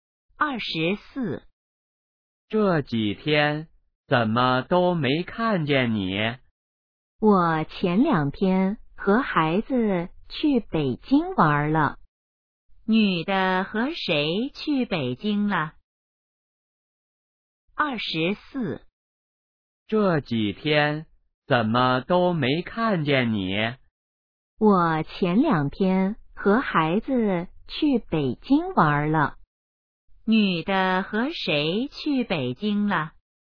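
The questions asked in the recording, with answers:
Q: 女的和谁去北京了?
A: 和孩子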